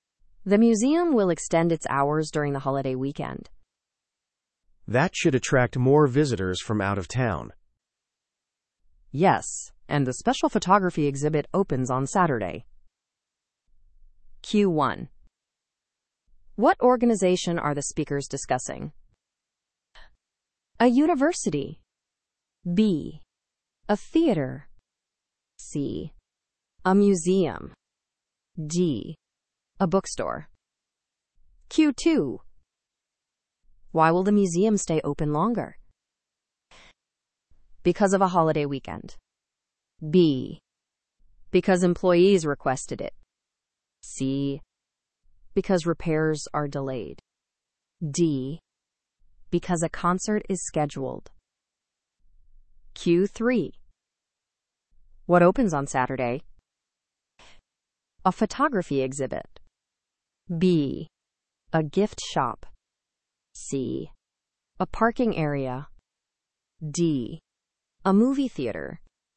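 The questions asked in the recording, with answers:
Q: What organization are the speakers discussing?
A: C: A museum.

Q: Why will the museum stay open longer?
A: A: Because of a holiday weekend.

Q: What opens on Saturday?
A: A: A photography exhibit.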